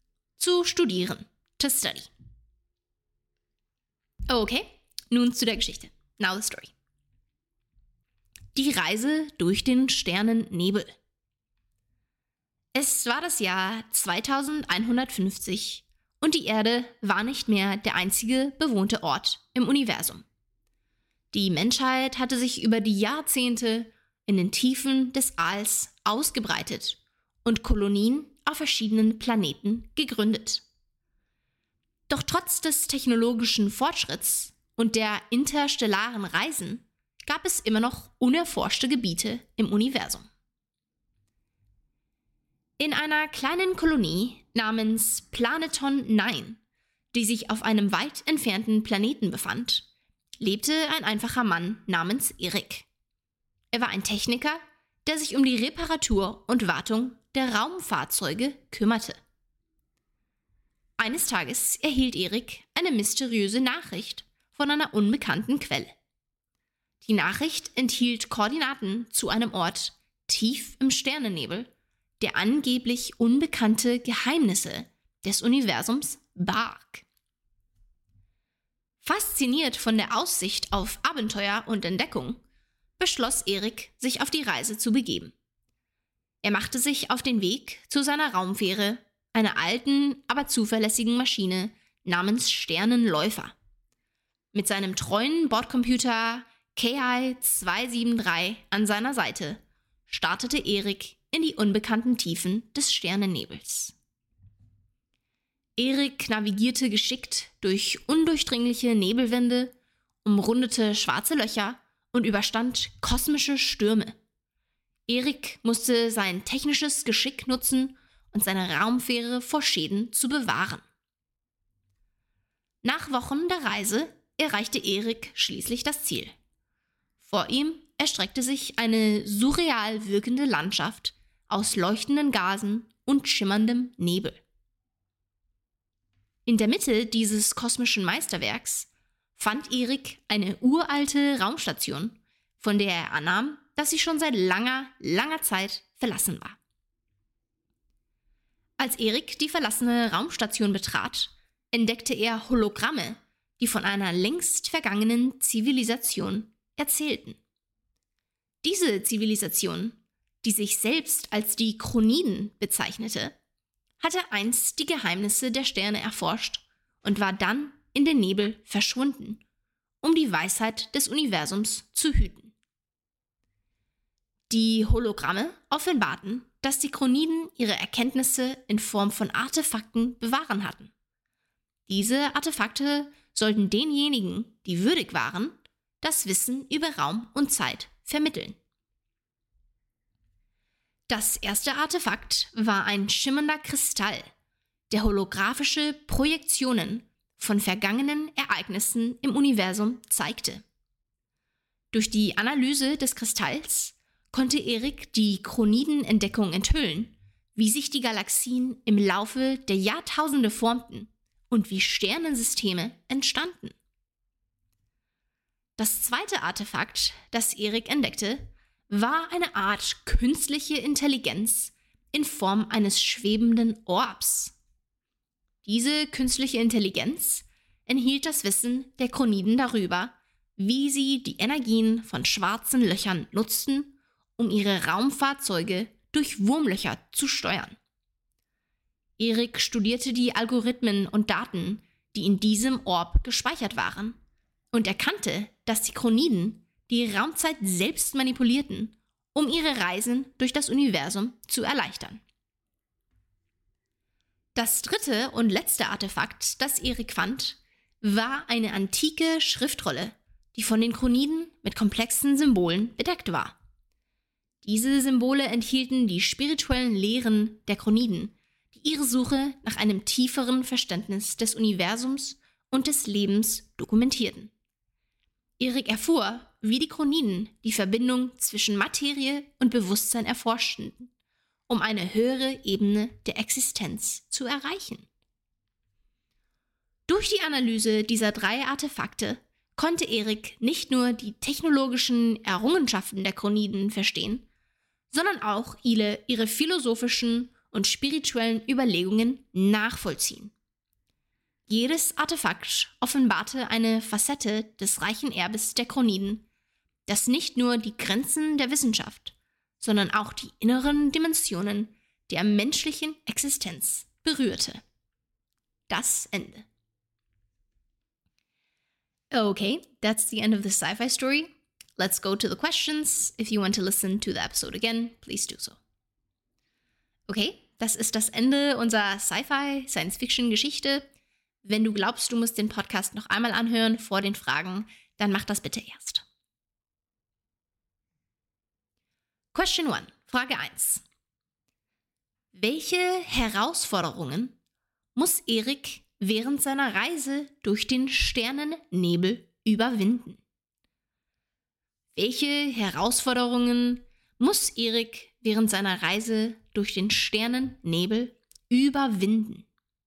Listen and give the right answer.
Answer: Während der Reise muss Erik geschickt durch undurchdringliche Nebelwände navigieren, schwarze Löcher umrunden und kosmische Stürme überstehen, wobei er sein technisches Geschick einsetzen muss, um seine Raumfähre vor Schäden zu bewahren.